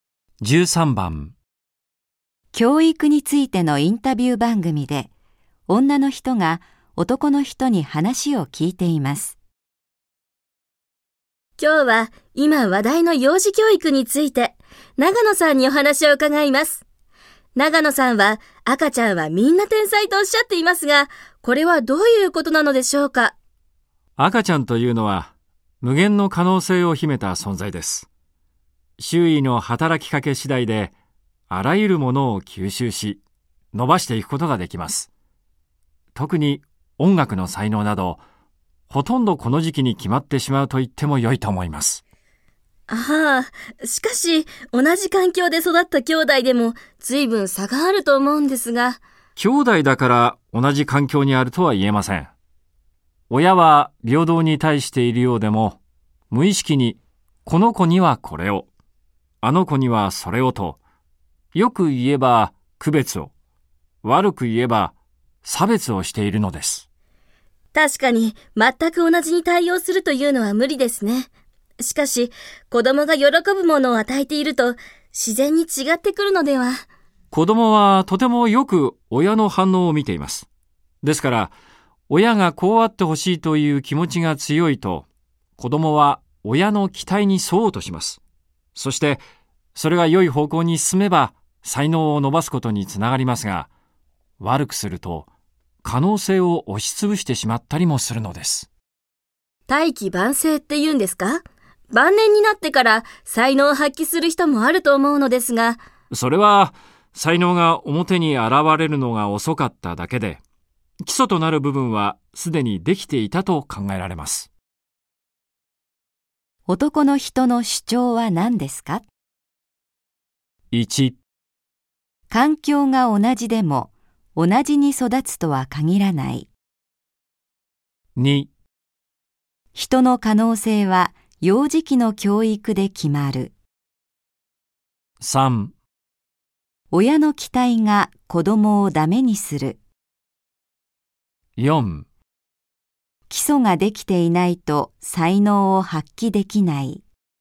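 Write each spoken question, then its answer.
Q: の人の主張は何ですか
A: 2: 人の可能性は幼児期の教育で決まる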